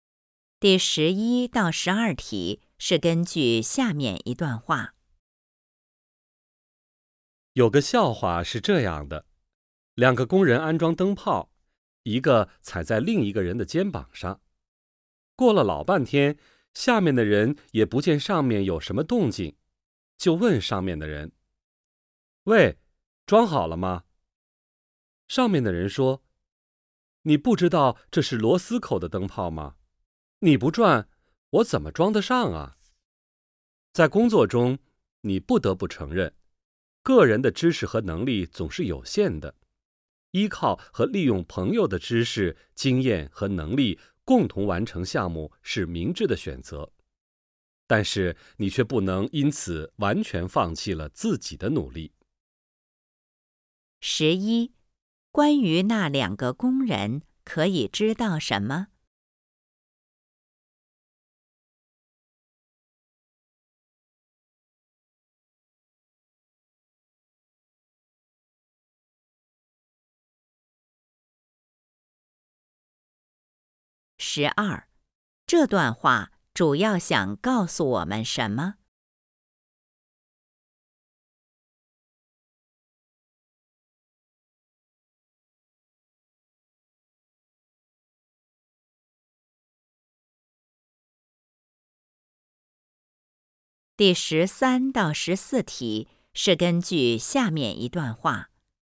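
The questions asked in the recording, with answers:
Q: 关于那两个工人可以知道什么?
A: 下面的人没有转,所以灯泡装不上

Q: 这段话主要想告诉我们什么?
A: 可以依靠朋友,但不能完全放弃自己的努力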